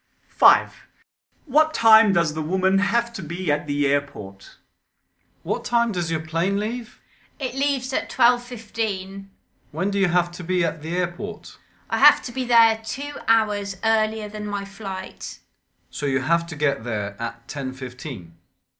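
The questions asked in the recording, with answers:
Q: What time does the woman have to be at the airport?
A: 10:15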